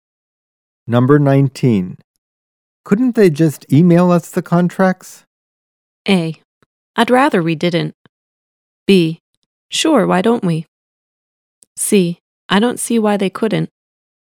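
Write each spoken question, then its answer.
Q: Couldn't they just email us the contracts?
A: C: I don't see why they couldn't.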